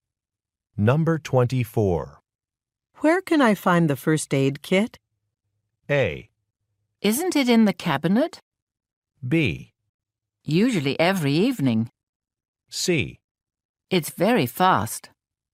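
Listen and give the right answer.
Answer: A: Isn't it in the cabinet?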